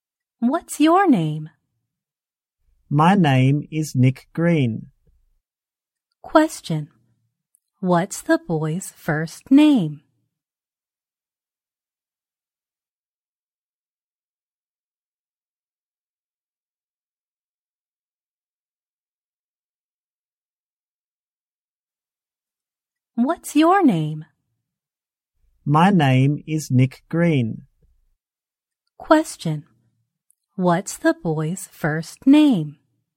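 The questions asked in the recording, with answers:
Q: What's the boy's first name?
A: Nick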